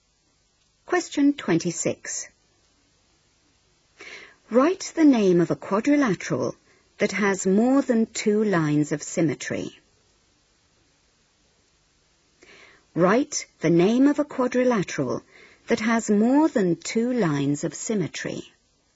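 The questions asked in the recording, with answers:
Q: Write the name of a quadrilateral that has more than two lines of symmetry.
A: Square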